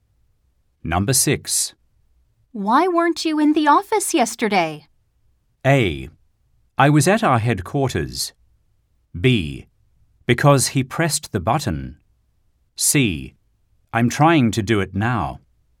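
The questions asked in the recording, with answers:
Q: Why weren't you in the office yesterday?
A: A: I was at our headquarters.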